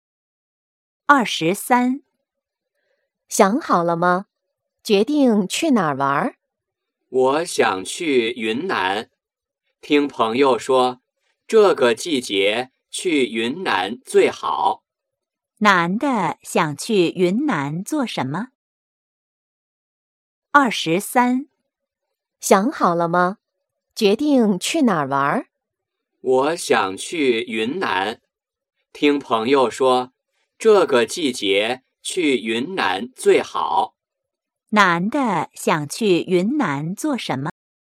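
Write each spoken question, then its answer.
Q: 男的想去云南做什么?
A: 去玩(旅游)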